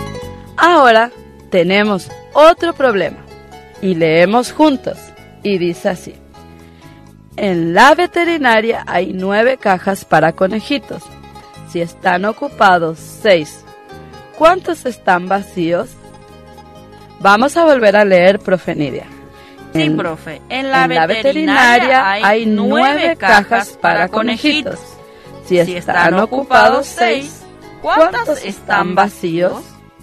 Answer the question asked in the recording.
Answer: Es decir, que quedan 3 cajas vacías.